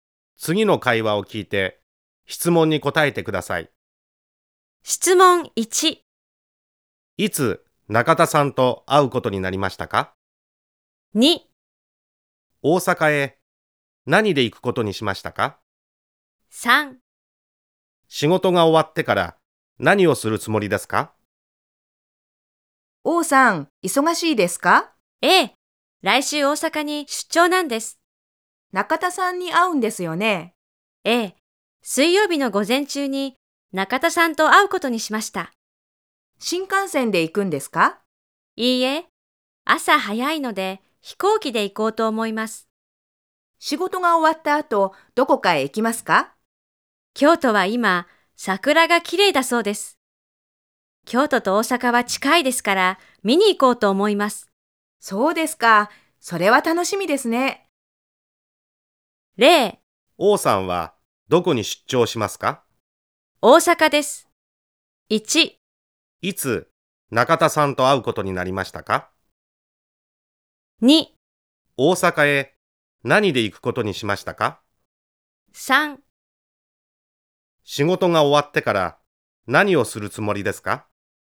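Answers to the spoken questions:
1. 水曜日の午前中です。
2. 飛行機で行くことにしました。
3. 京都へ桜を見に行くつもりです。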